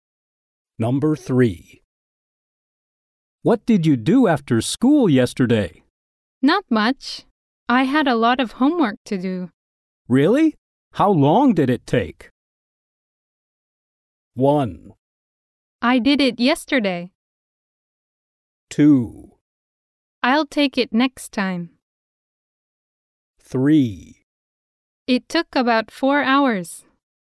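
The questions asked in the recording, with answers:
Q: Really? How long did it take?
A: 3: It took about 4 hours.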